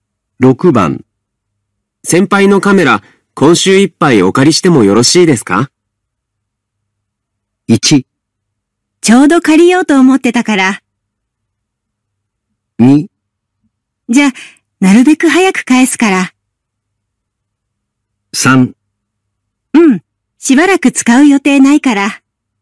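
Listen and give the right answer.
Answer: 3: うん、しばらく使う予定ないから。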